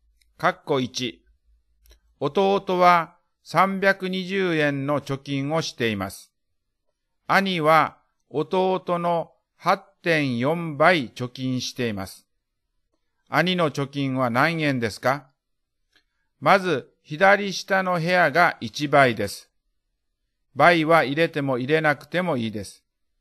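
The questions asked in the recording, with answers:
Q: 兄の貯金は何円ですか?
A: 2688円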